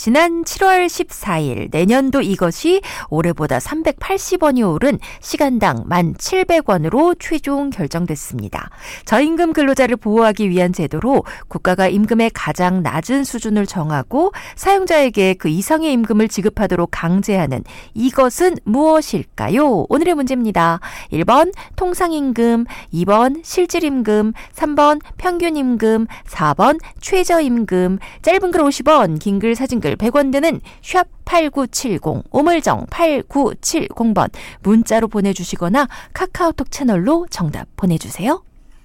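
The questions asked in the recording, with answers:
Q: 저임금 근로자를 보호하기 위한 제도로 국가가 임금의 가장 낮은 수준을 정하고 사용자에게 그 이상의 임금을 지급하도록 강제하는 이것은 무엇일까요?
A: 4: 최저임금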